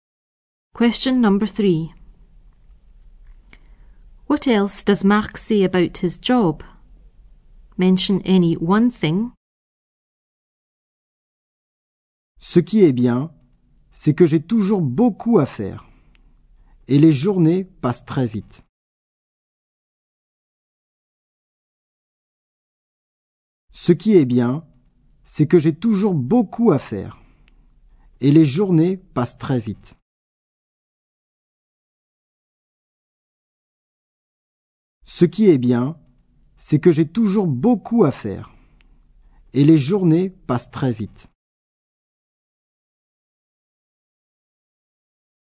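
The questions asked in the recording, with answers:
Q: What else does Marc say about his job?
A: He always has a lot to do; the days pass quickly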